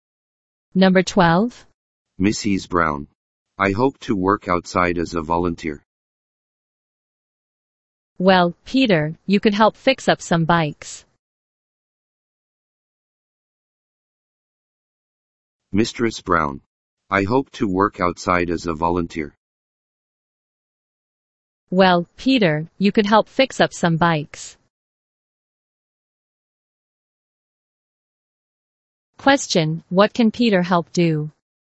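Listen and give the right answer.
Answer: Fix up some bikes.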